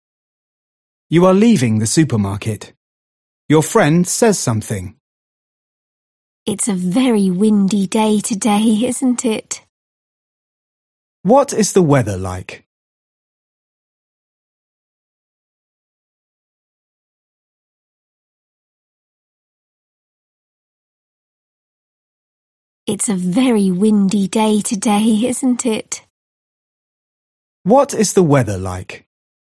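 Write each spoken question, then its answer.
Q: What is the weather like?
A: very windy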